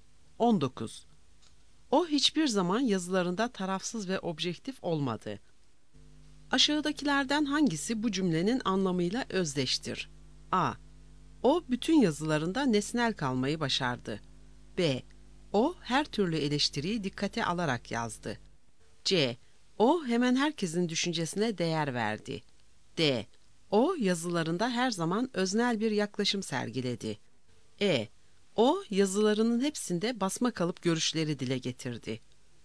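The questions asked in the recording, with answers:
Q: Aşağıdakilerden hangisi bu cümlenin anlamıyla özdeştir?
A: D: O yazılarında her zaman öznel bir yaklaşım sergiledi.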